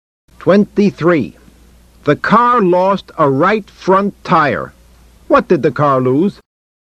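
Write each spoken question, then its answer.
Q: What did the car lose?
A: A right front tire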